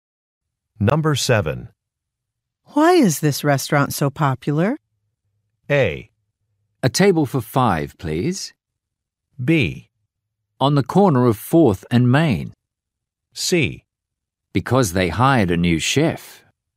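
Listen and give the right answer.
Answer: C: because they hired a new chef.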